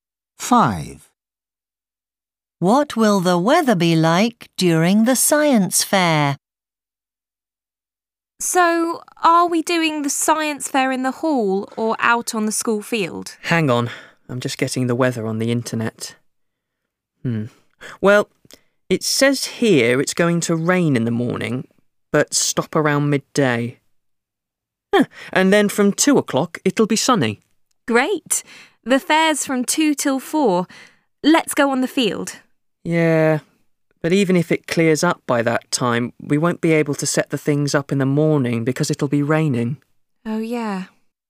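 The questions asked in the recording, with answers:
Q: What will the weather be like during the science fair?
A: Sunny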